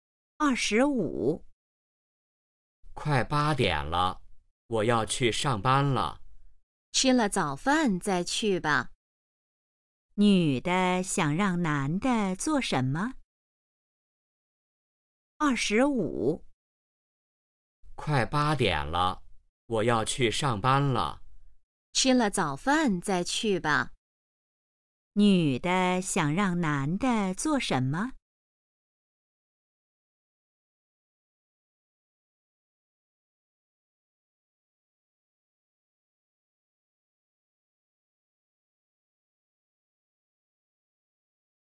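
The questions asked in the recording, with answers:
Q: 女的想让男的做什么?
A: 吃早饭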